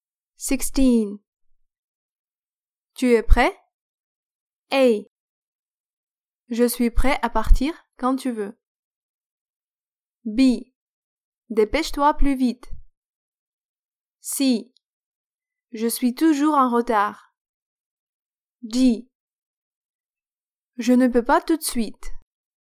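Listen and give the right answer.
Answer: A: Je suis prêt à partir quand tu veux.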